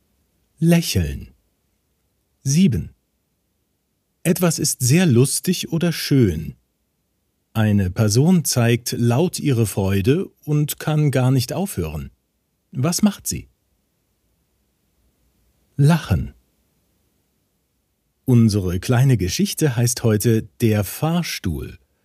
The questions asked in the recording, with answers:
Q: Was macht sie?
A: Lachen.